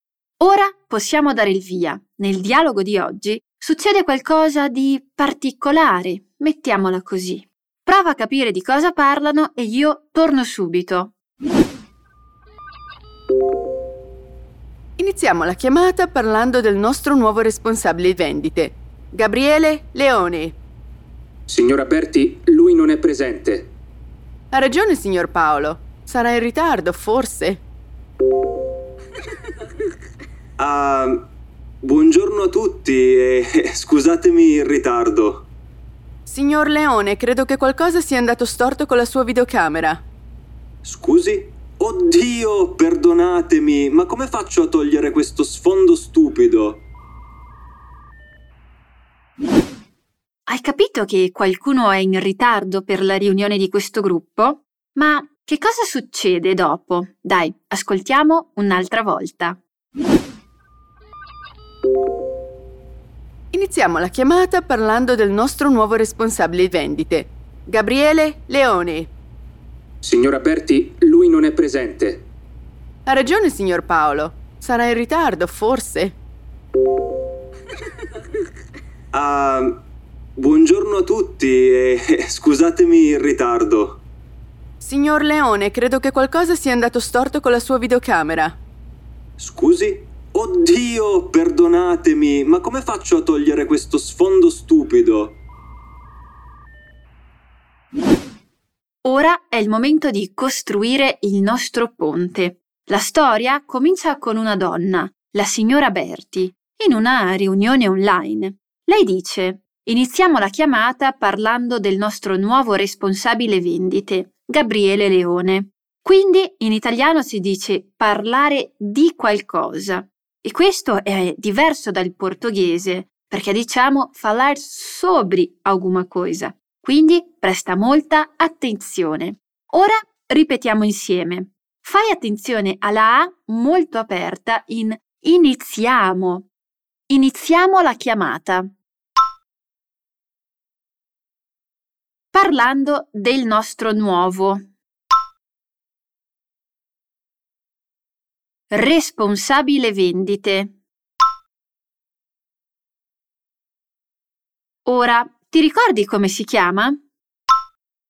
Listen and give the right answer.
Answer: Gabriele Leone.